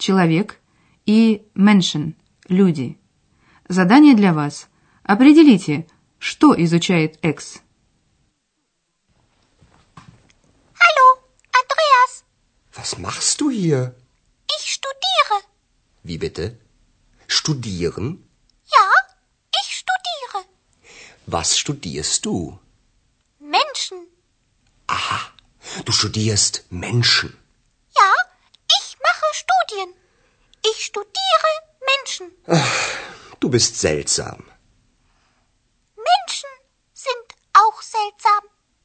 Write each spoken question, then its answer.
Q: Определите, что изучает Экс.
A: Итак, Экс изучает людей.